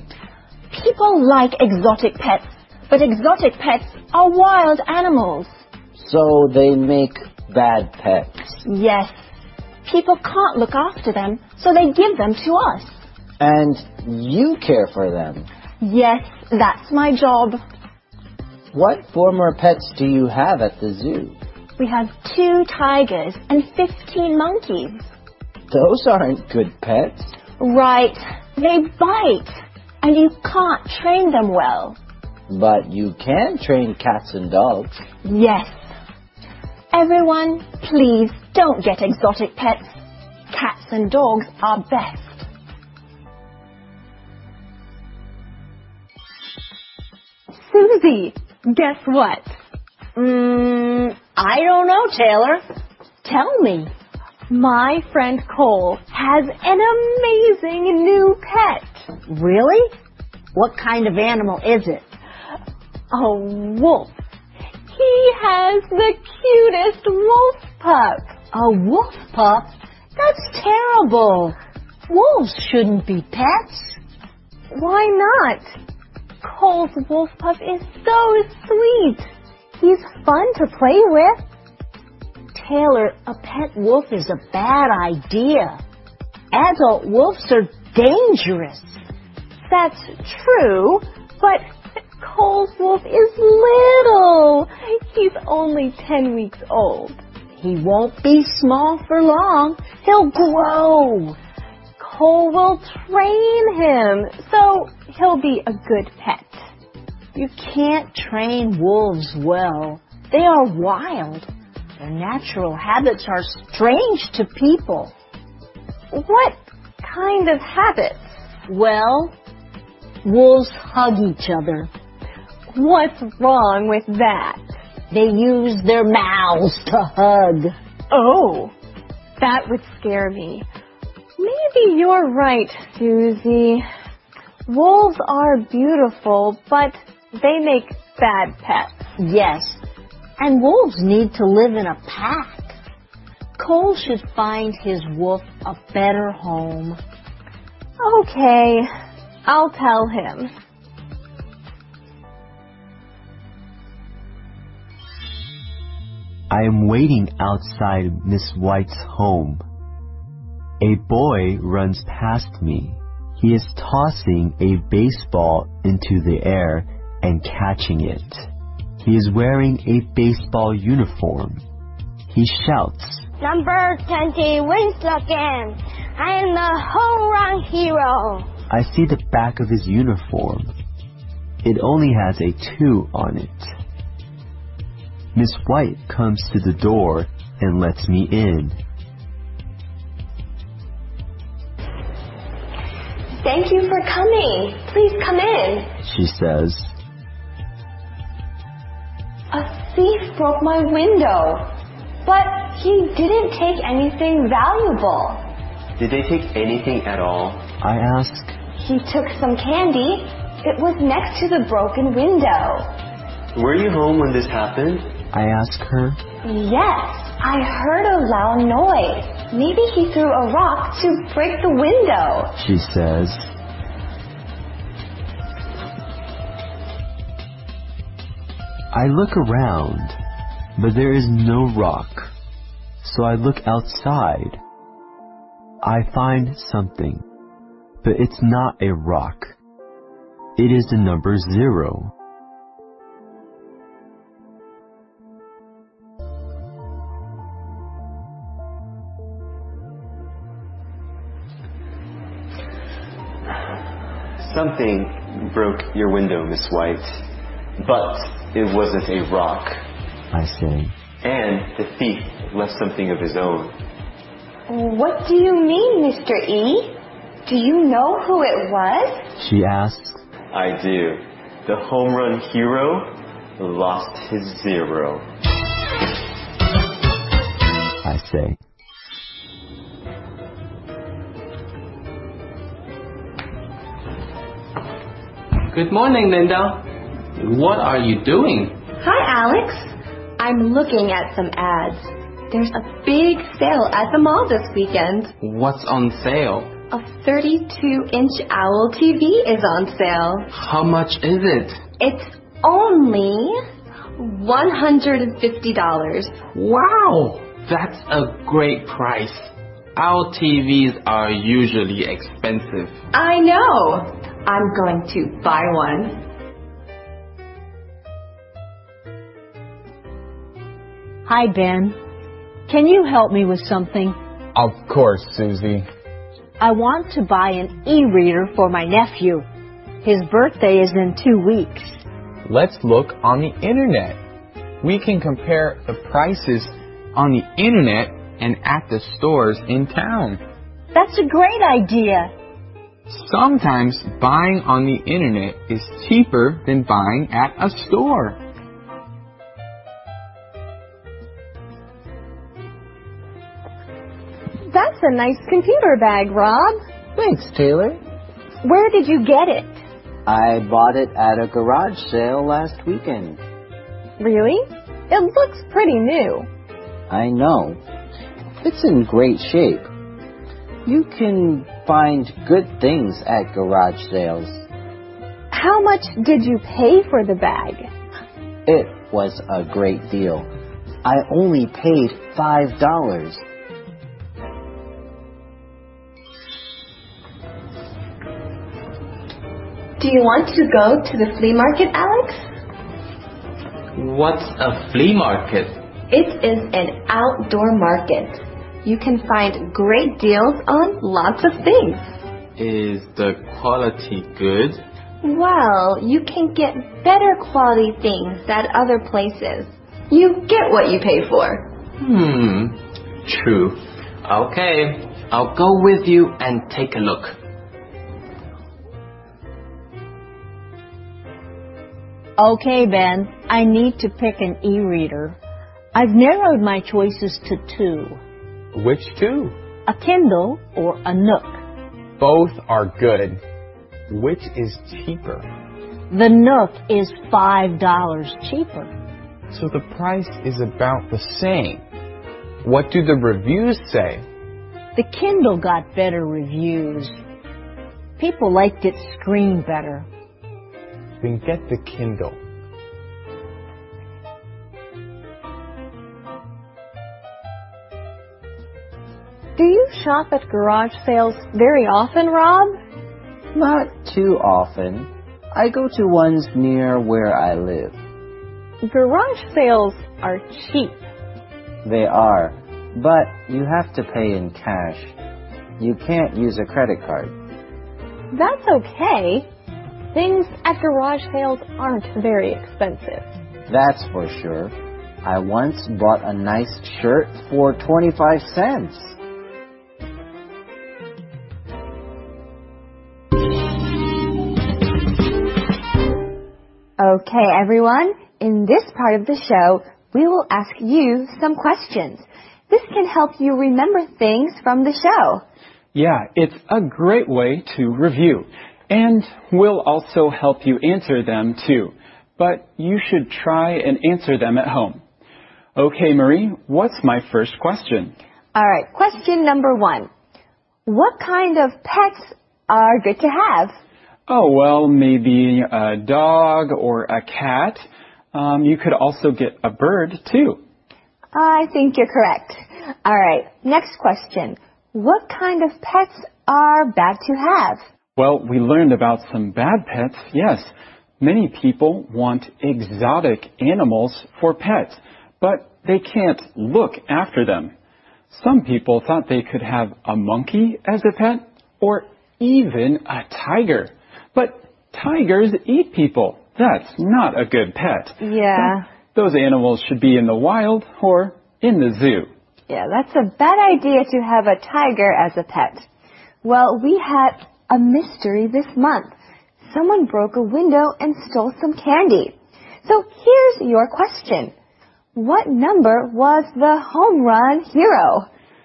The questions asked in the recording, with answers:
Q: What kind of pets are good to have?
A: Oh, well, maybe a dog or a cat.

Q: What kind of pets are bad to have?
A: Many people want exotic animals for pets, but they can't look after them.

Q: What number was the home run hero?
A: He was number 20.